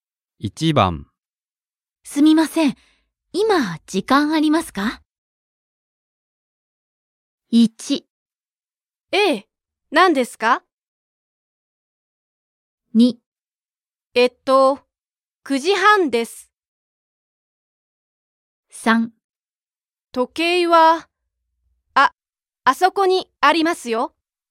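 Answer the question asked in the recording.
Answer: 1: ええ、何ですか?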